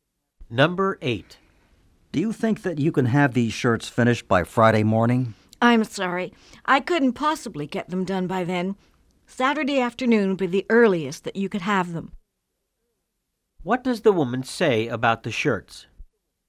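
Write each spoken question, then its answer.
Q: What does the woman say about the shirts?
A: They won't be ready until Saturday afternoon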